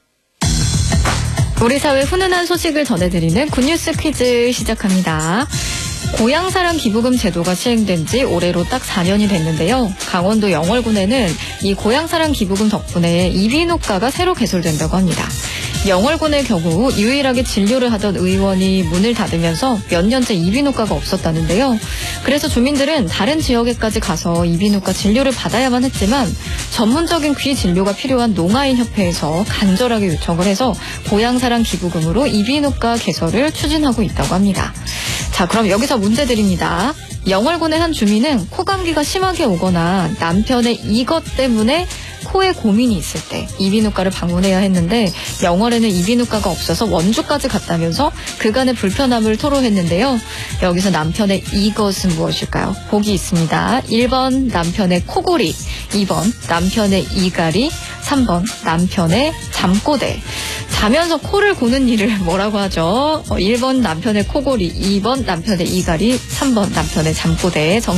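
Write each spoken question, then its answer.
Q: 여기서 남편의 이것은 무엇일까요?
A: 1: 남편의 코골이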